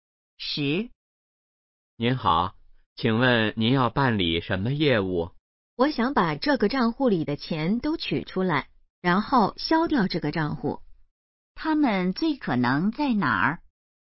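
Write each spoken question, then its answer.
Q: 他们最可能在哪儿?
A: 银行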